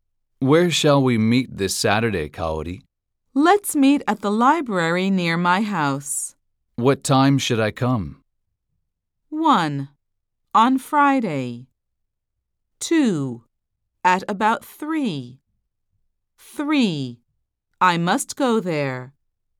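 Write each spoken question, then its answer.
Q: What time should I come?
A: 2: At about 3.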